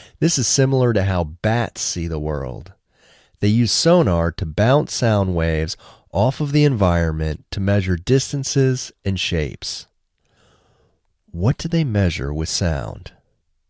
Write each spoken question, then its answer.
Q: What do they measure with sound?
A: They measure distances and shapes with sound.